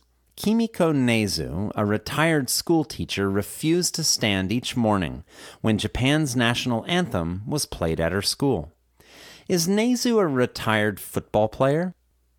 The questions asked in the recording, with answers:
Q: Is Nezu a retired football player?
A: No, Nezu isn't a retired football player.